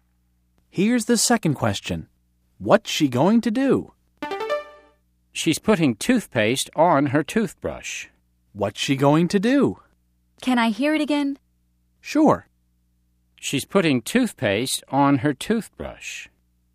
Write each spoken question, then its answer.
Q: What's she going to do?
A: I know. She's going to brush her teeth.